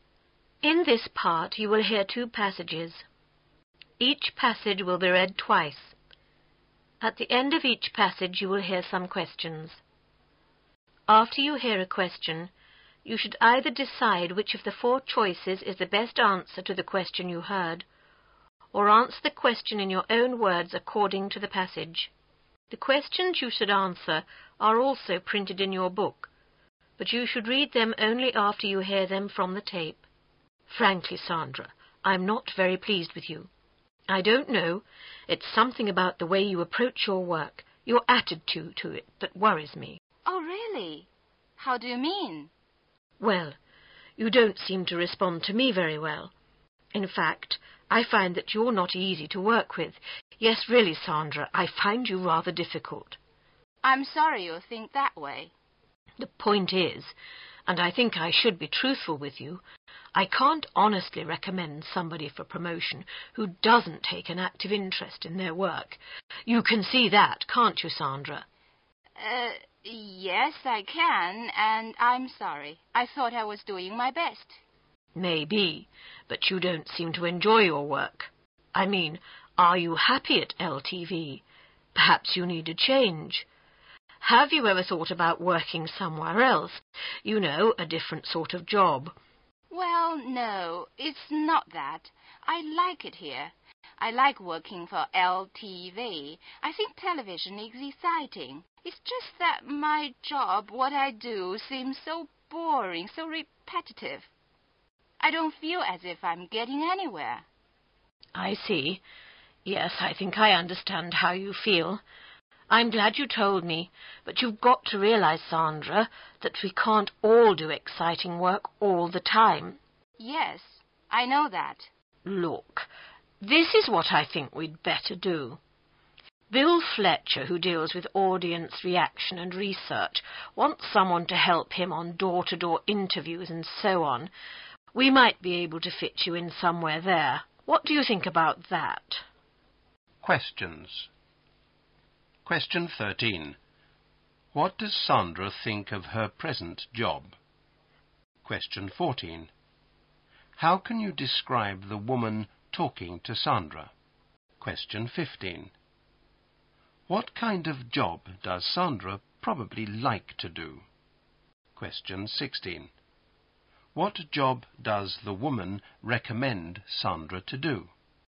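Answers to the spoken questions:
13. It is boring and repetitive.
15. Exciting work
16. Helping Bill Fletcher with door-to-door interviews on audience reaction and research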